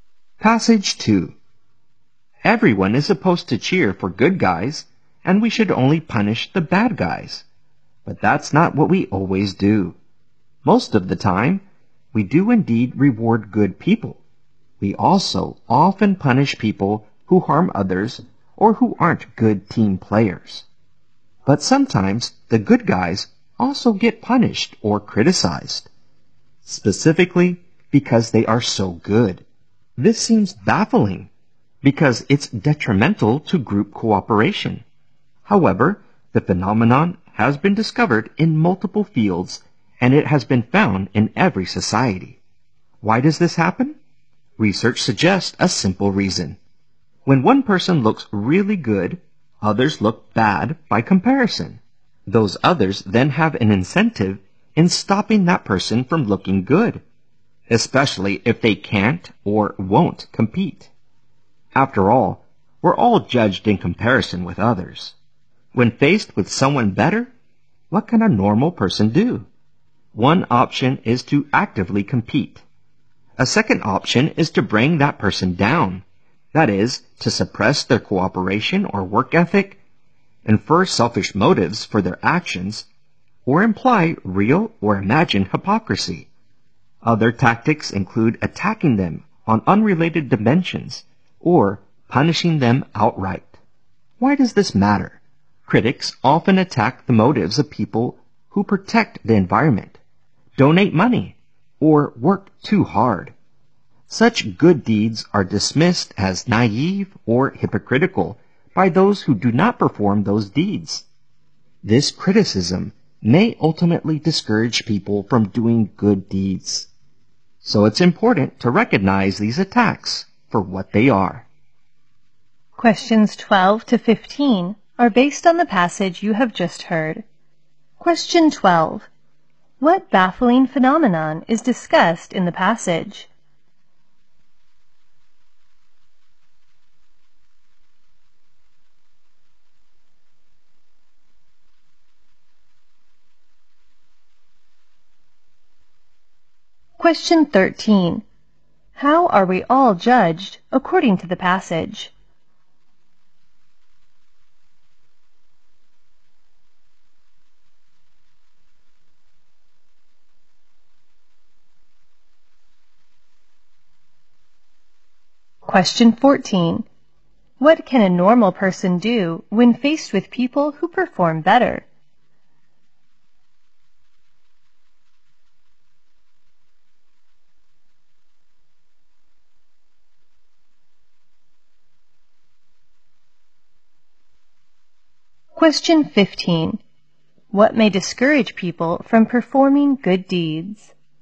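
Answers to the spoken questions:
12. Good people are sometimes punished or criticized because they are so good.
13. In comparison with others.
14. Compete actively, or bring that person down.
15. Criticism that their deeds are naive or hypocritical.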